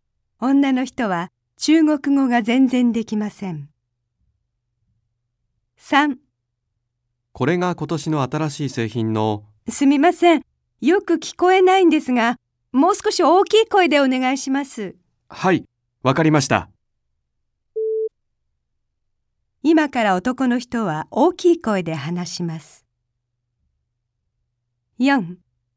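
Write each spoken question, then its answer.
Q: 今から男の人は大きい声で話します。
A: ○(正しい)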